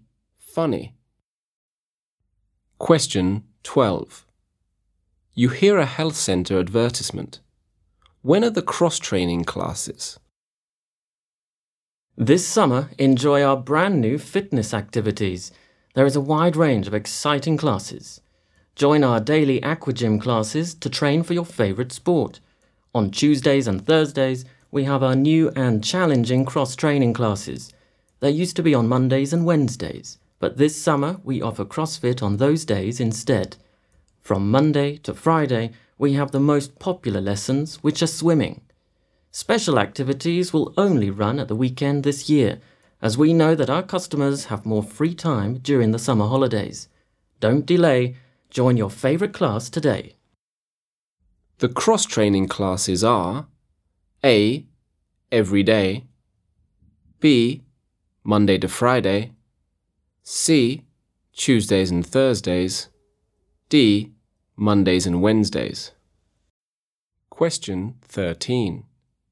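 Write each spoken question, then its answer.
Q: When are the cross-training classes?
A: C: Tuesdays and Thursdays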